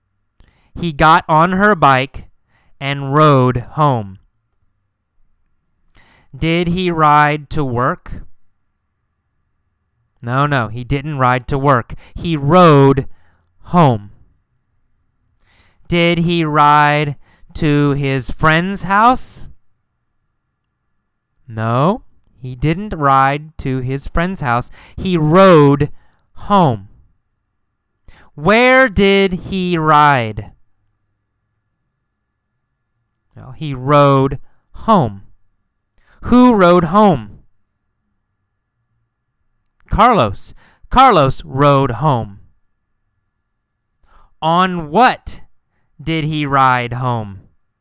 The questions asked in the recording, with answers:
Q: On what did he ride home?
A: On her bike, right? He rode home on her bike.